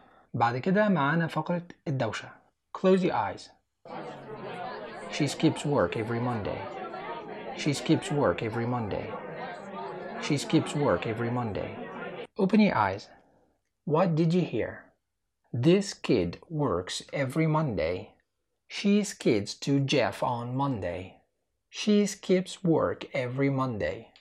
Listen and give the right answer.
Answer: The answer is number 3.